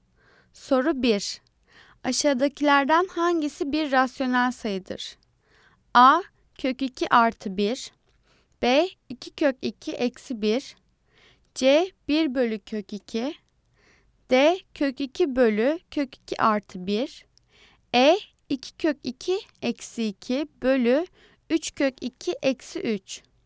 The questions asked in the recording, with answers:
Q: Aşağıdakilerden hangisi bir rasyonel sayıdır?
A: Cevap E. 2 kök 2 eksi 2 bölü 3 kök 2 eksi 3.